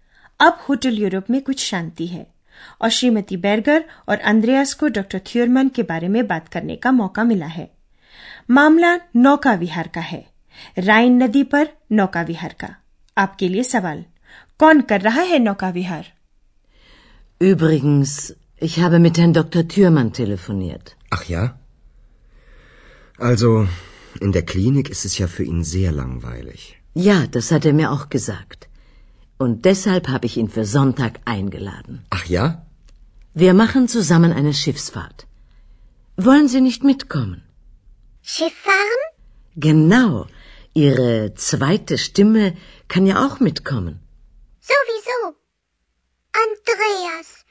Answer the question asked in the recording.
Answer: श्रीमती Berger ने doctor थ्यूरमन को नौका विहार का निमंत्रण दिया है